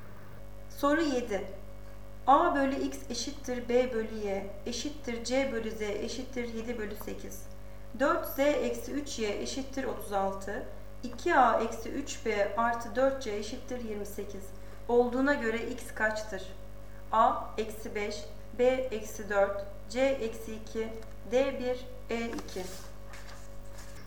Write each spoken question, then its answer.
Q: Olduğuna göre X kaçtır?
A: Doğru cevap C eksi 2.